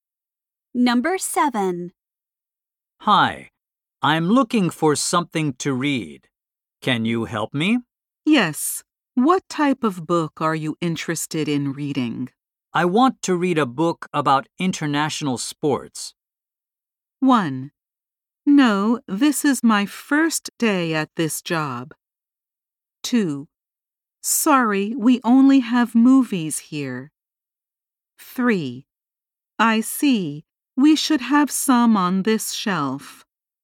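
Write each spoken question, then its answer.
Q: I want to read a book about international sports.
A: 3: I see. We should have some on this shelf.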